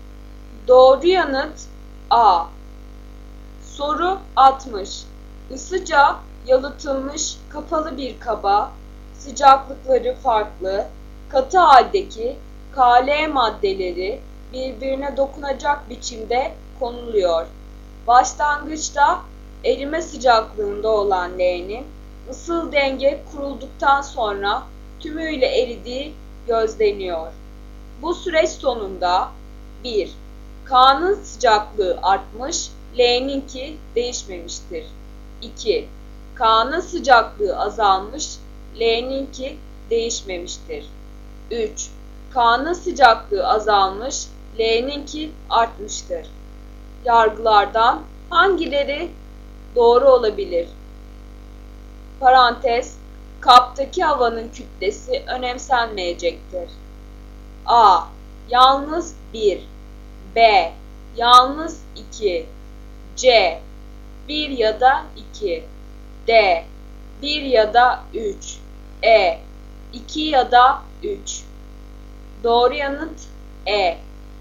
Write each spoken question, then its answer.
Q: Yargılardan hangileri doğru olabilir?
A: Doğru yanıt E.